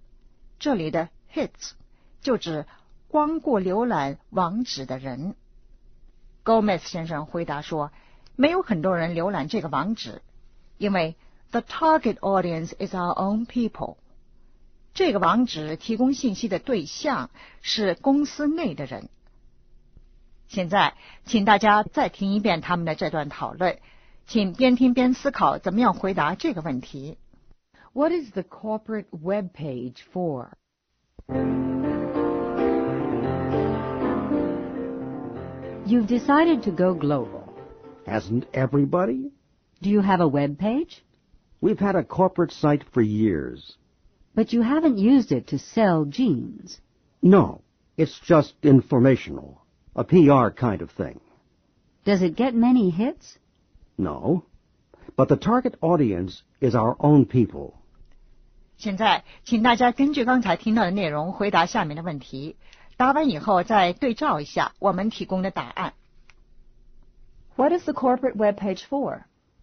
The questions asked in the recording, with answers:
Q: What is the corporate web page for?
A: PR.